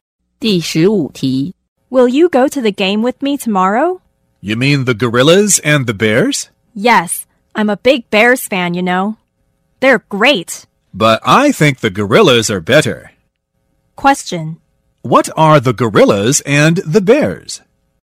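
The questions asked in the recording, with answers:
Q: What are the gorillas and the bears?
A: Sports teams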